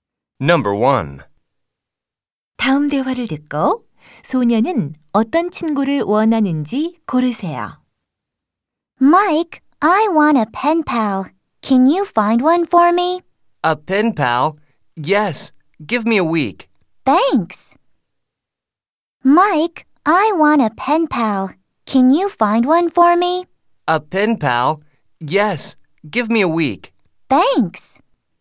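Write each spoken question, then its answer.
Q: 다음 대화를 듣고 소녀는 어떤 친구를 원하는지 고르세요.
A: 펜팔 (pen pal)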